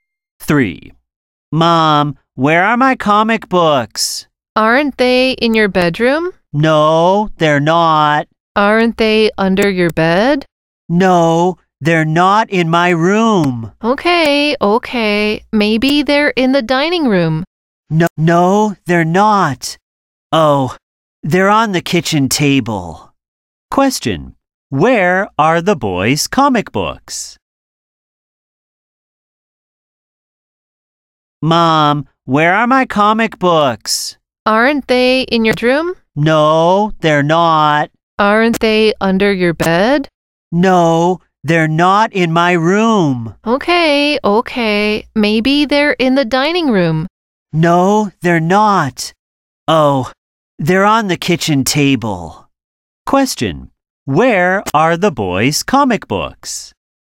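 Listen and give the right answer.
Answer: On the kitchen table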